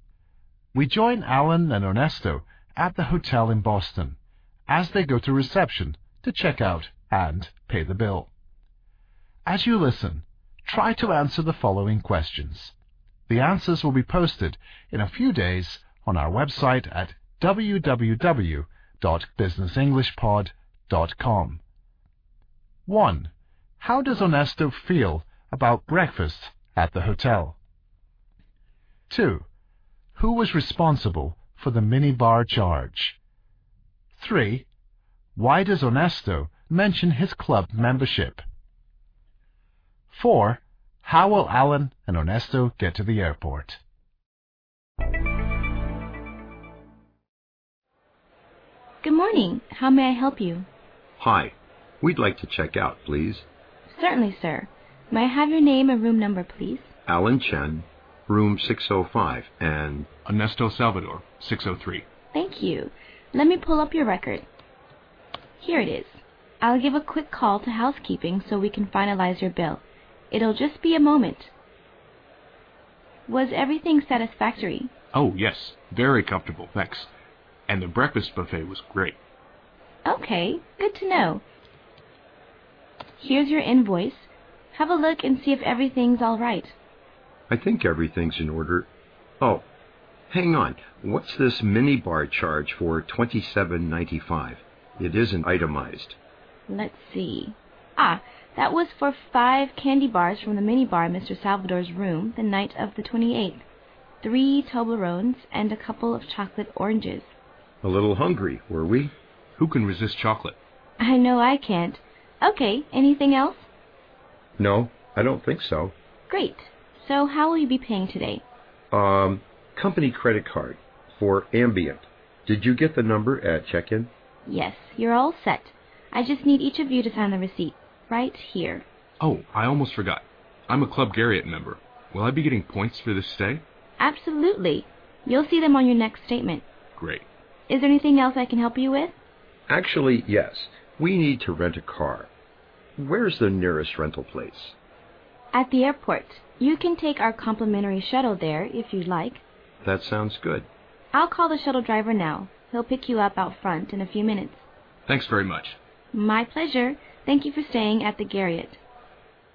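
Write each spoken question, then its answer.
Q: How does Ernesto feel about breakfast at the hotel?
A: He thought the breakfast buffet was great.

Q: Who was responsible for the minibar charge?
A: Ernesto (Mr. Salvador)

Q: Why does Ernesto mention his club membership?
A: To make sure he gets points for the stay.

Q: How will Alan and Ernesto get to the airport?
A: By the hotel's free shuttle.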